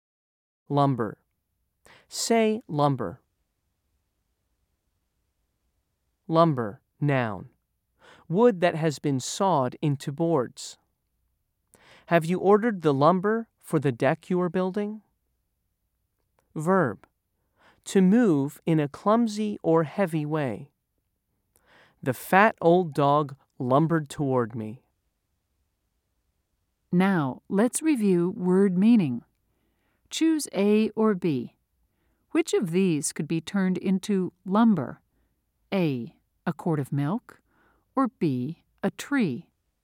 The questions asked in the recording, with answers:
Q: Choose A or B. Which of these could be turned into lumber?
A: If you said B, you're right.